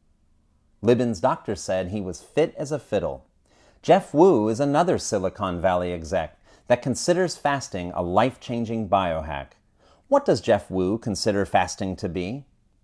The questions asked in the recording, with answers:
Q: What does Jeff Wu consider fasting to be?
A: Jeff Wu considers fasting a life-changing biohack.